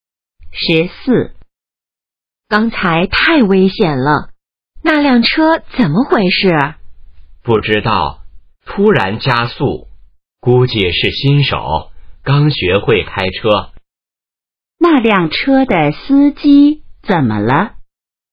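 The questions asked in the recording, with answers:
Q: 那辆车的司机怎么了?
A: 可能是新手,刚学会开车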